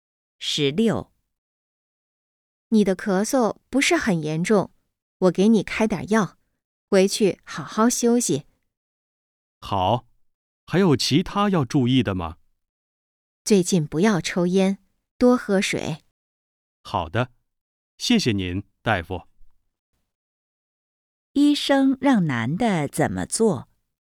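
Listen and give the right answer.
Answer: 回去好好休息,不要抽烟,多喝水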